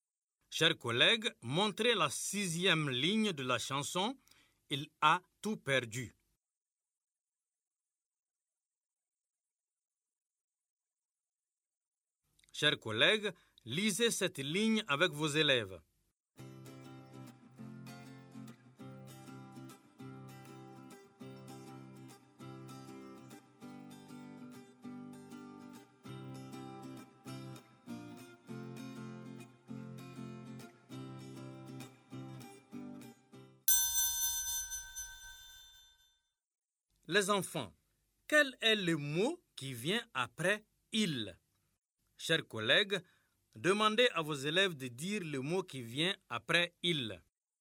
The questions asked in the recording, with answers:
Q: Les enfants, quel est le mot qui vient après « il » ?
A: Monsieur, c'est A.